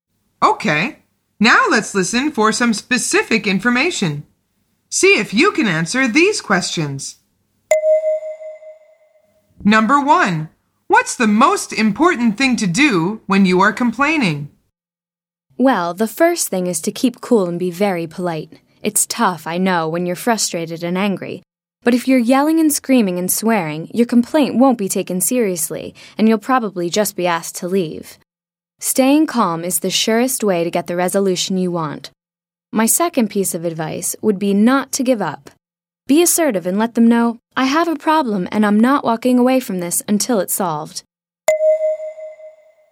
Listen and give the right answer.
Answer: The answer is stay calm.